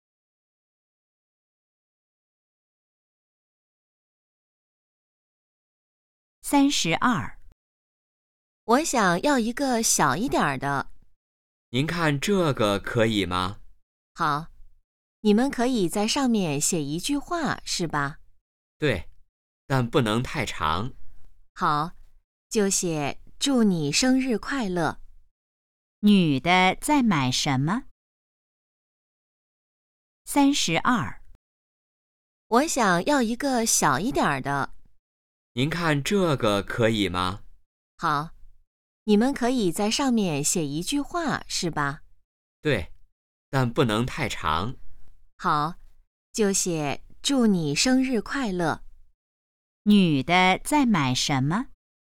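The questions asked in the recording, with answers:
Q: 女的在买什么?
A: 生日蛋糕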